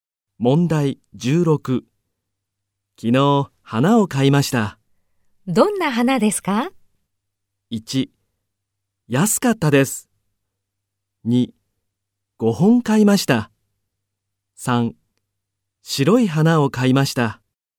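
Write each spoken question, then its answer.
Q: どんな花ですか?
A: 1: 白い花を買いました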